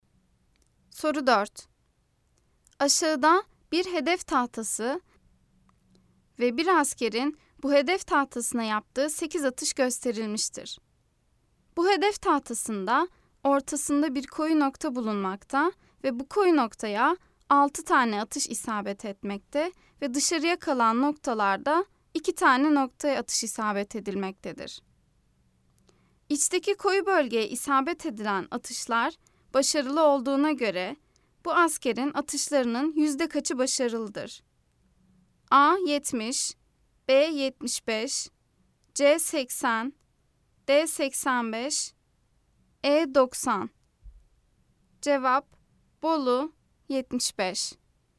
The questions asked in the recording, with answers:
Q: İçteki koyu bölgeye isabet edilen atışlar başarılı olduğuna göre bu askerin atışlarının yüzde kaçı başarılıdır?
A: Cevap: Bolu 75.